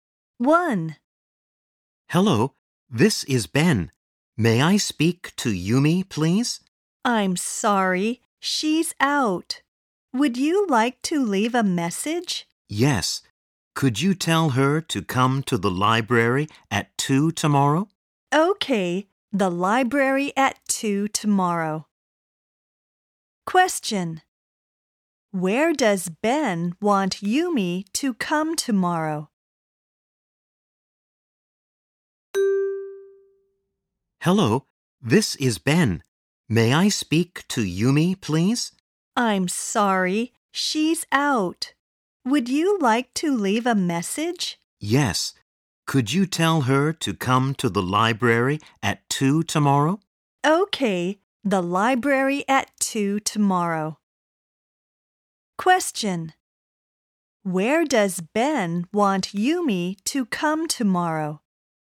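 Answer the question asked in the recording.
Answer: To the library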